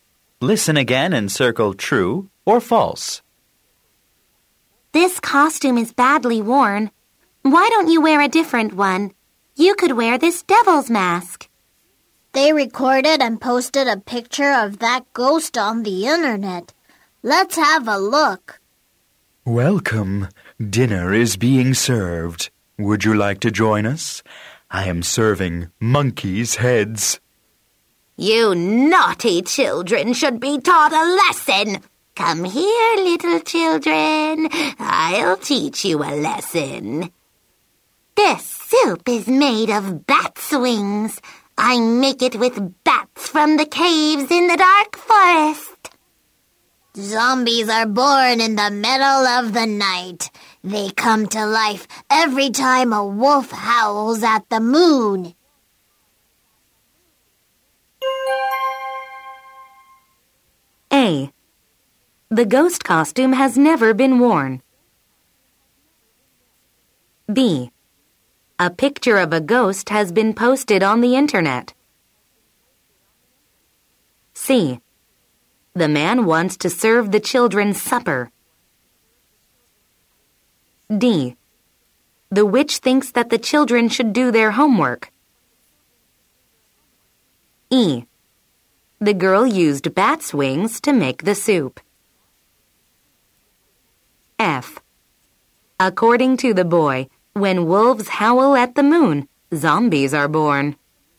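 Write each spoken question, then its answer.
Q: The ghost costume has never been worn.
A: False

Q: A picture of a ghost has been posted on the internet.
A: True

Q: The witch thinks that the children should do their homework.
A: False

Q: According to the boy, when wolves howl at the moon, zombies are born.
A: False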